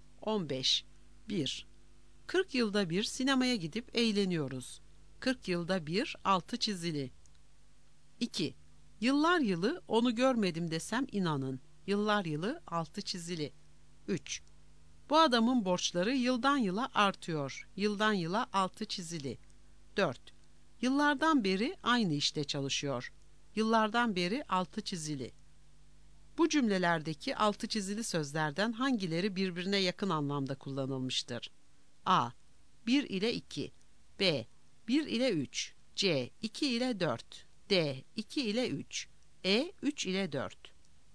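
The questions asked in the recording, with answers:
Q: Bu cümlelerdeki altı çizili sözlerden hangileri birbirine yakın anlamda kullanılmıştır?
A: C: 2 ile 4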